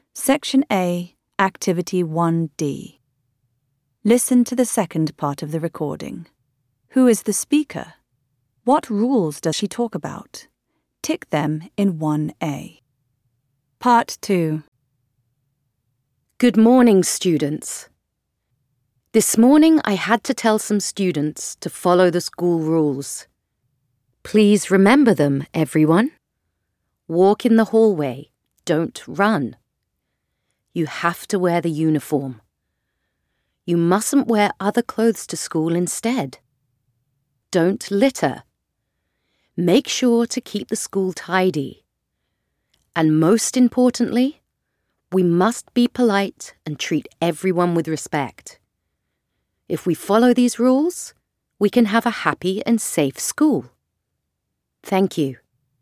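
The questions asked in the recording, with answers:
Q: What rules does she talk about?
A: Walk in the hallway, don't run; wear the uniform; don't litter; be polite and treat everyone with respect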